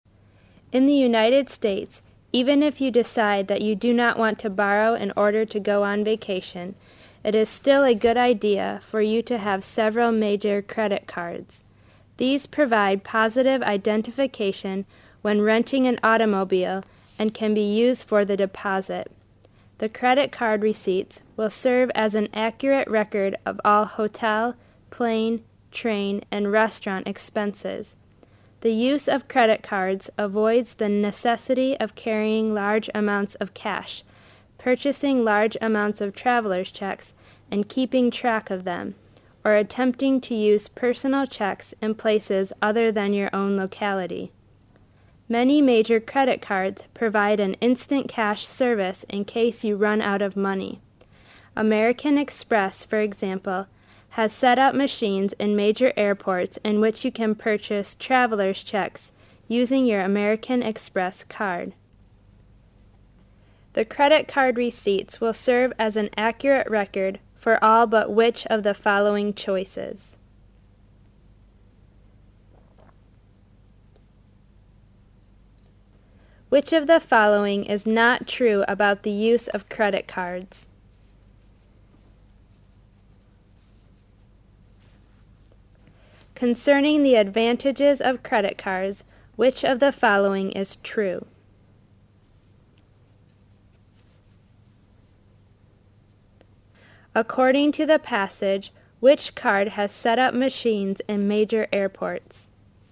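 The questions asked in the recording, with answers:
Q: According to the passage, which card has set up machines in major airports?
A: American Express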